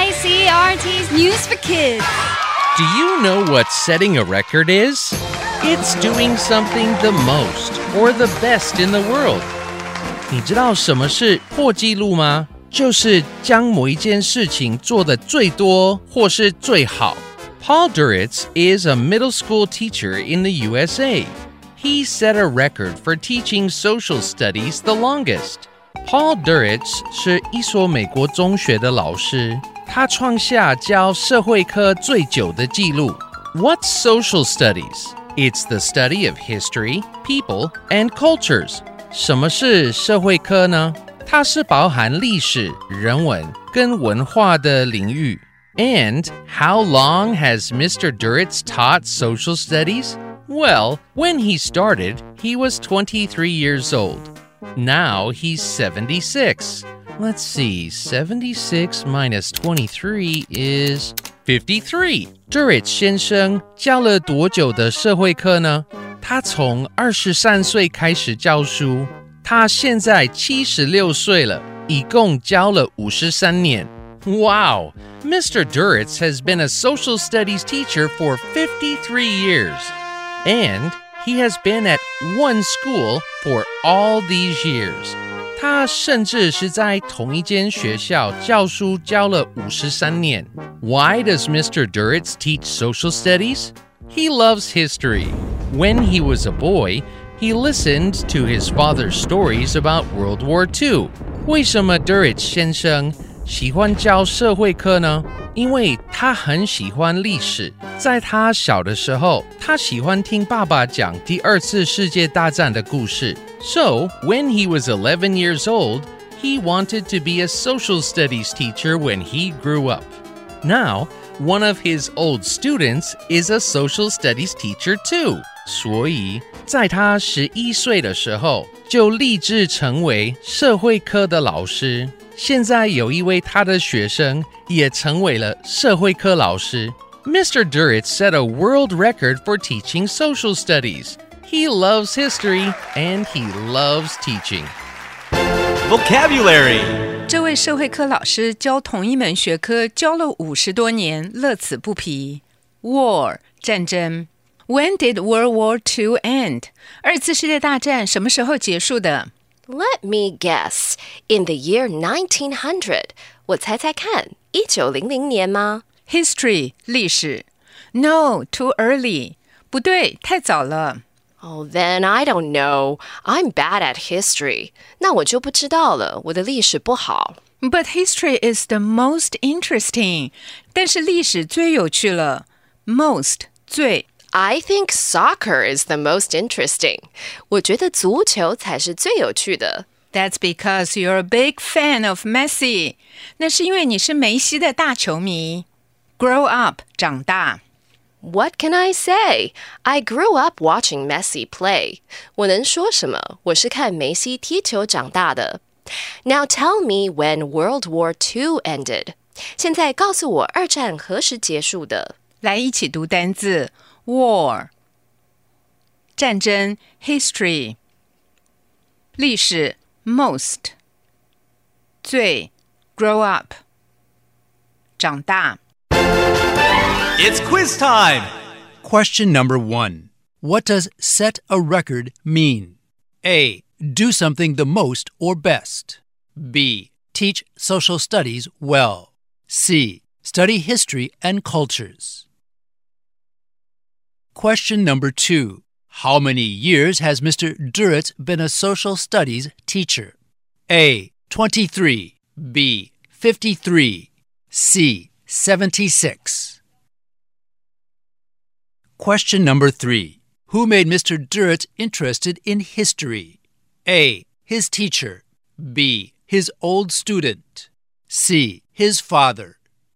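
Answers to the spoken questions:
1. A: Do something the most or best.
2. B: 53.
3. C: His father.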